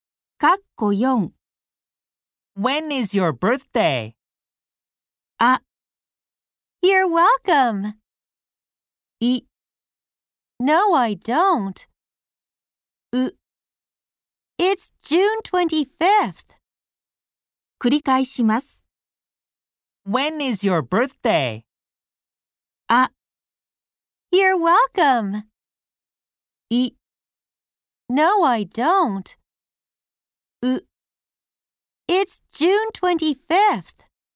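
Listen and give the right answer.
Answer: う: It's June 25th.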